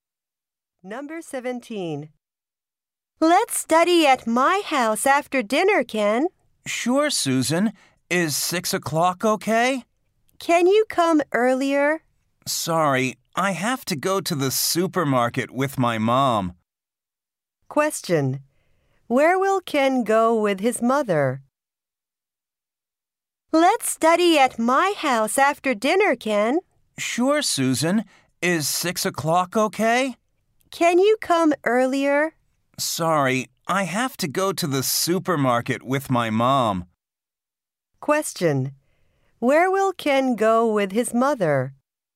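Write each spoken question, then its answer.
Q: Where will Ken go with his mother?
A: To the supermarket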